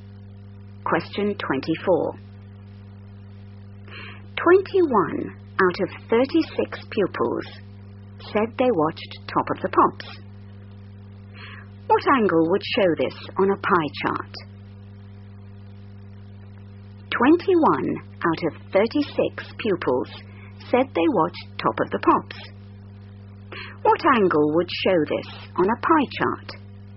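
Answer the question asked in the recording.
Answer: 210 degrees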